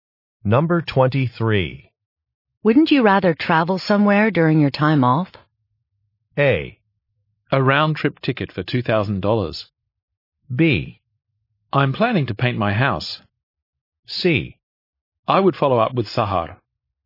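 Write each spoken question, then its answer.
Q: Wouldn't you rather travel somewhere during your time off?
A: B: I'm planning to paint my house.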